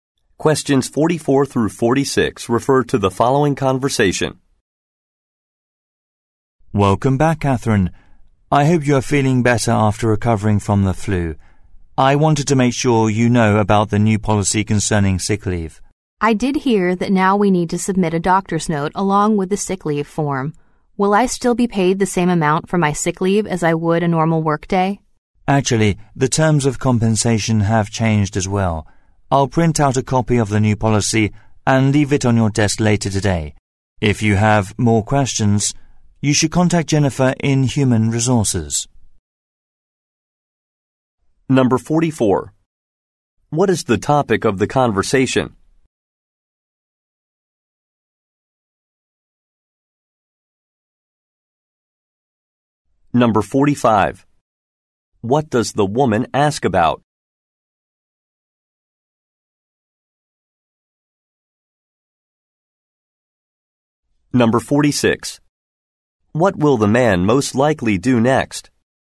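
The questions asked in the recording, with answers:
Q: What is the topic of the conversation?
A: A new sick leave policy

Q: What does the woman ask about?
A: Pay for sick leave

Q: What will the man most likely do next?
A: Print a copy of the new policy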